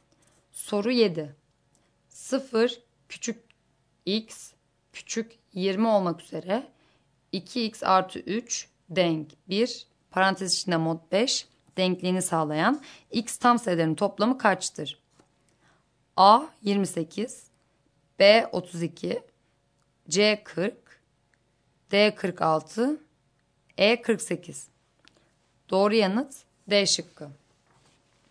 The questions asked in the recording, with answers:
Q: 0 küçük x küçük 20 olmak üzere 2x artı 3 denk 1 parantez içinde mod 5 denkliğini sağlayan x tam sayılarının toplamı kaçtır?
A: Doğru yanıt D şıkkı.